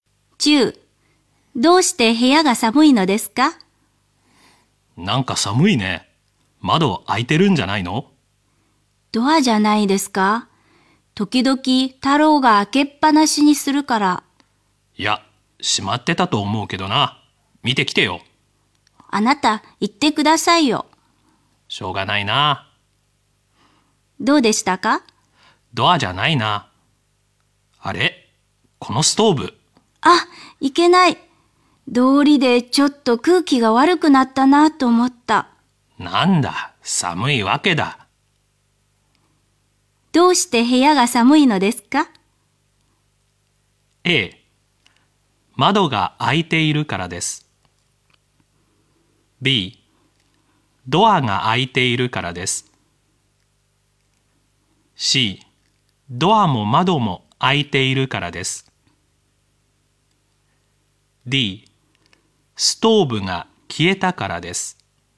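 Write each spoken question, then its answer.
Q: どうして部屋が寒いのですか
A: D: ストーブが消えたからです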